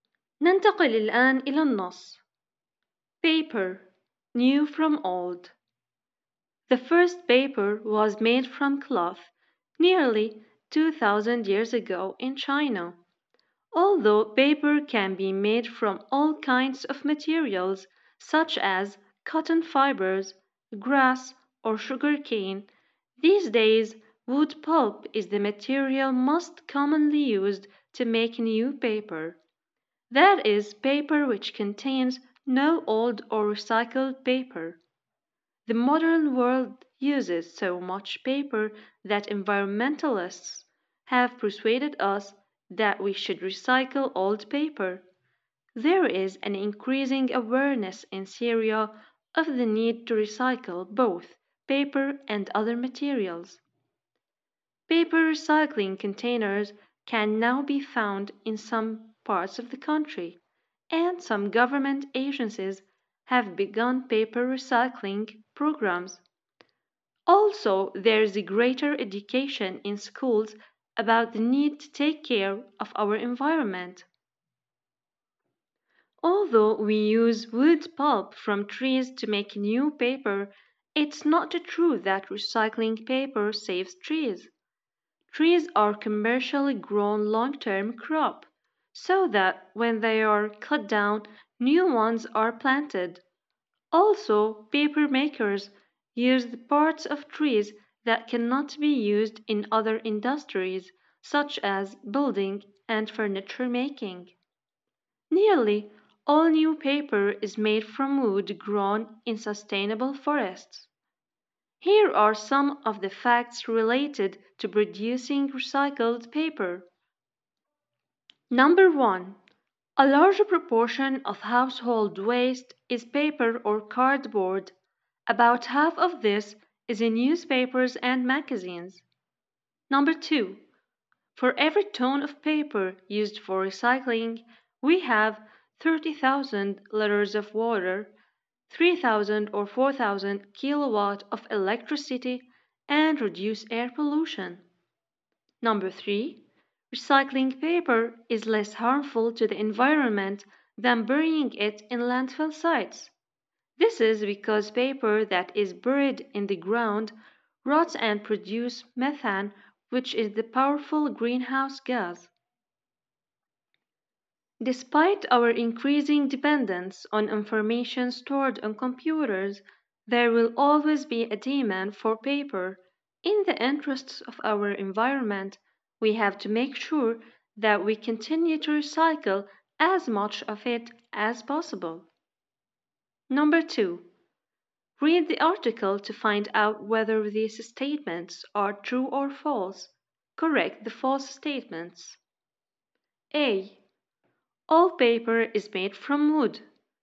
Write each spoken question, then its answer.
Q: All paper is made from wood.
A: The answer is false. Paper can be made from various different materials.